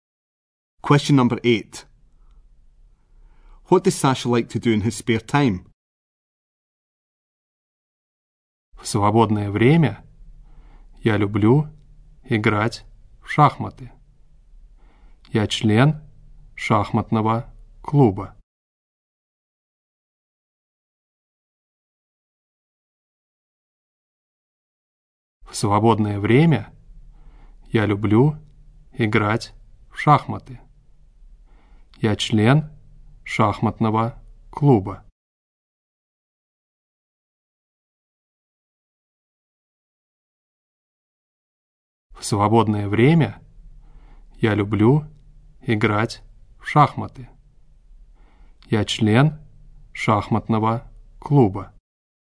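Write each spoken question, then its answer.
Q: What does Sasha like to do in his spare time?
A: Play chess (he is in a chess club)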